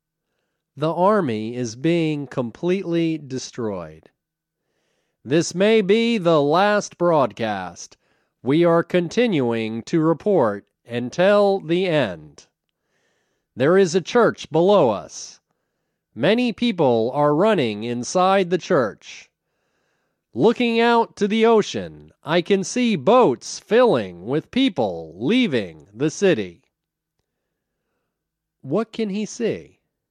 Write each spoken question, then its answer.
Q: What can he see?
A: He can see boats filling with people leaving the city.